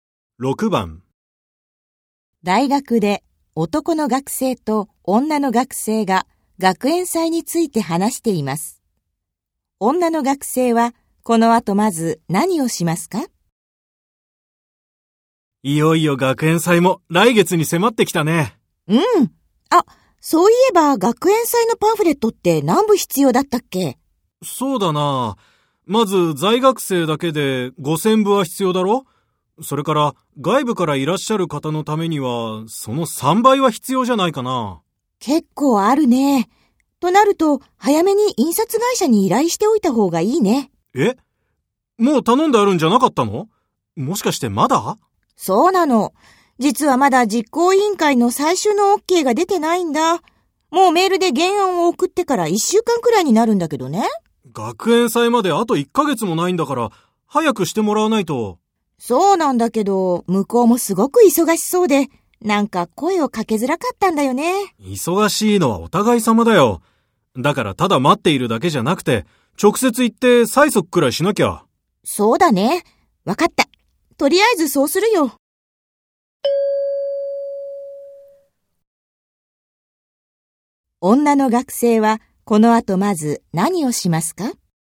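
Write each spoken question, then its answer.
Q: 女の学生はこの後まず何をしますか?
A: 実行委員会に直接行って、パンフレットの原案に最終OKを出すよう催促する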